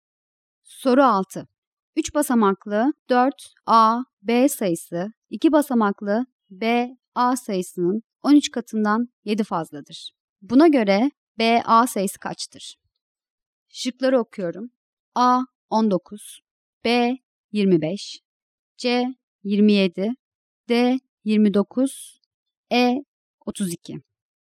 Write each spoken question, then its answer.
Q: Buna göre B, A sayısı kaçtır?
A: Doğru cevap E şıkkı.